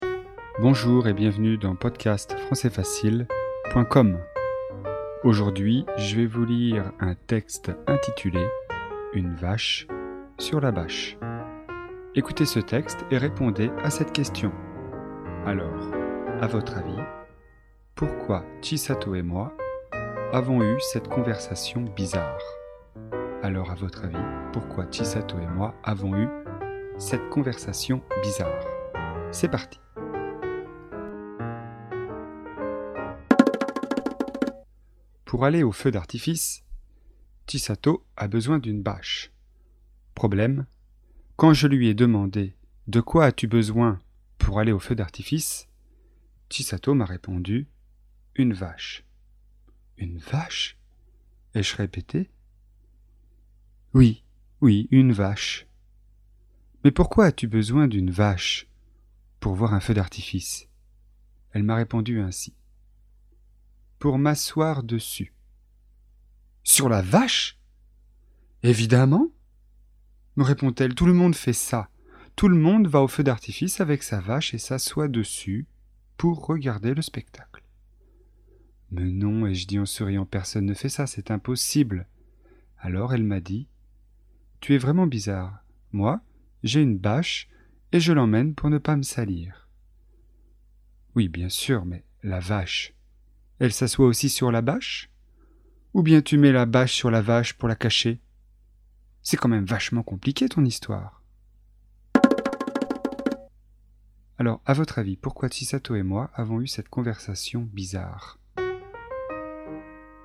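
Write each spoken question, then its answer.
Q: Alors, à votre avis, pourquoi Chisato et moi avons eu cette conversation bizarre ?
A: Parce que Chisato a prononcé « bâche » comme « vache » : elle voulait une bâche, pas une vache.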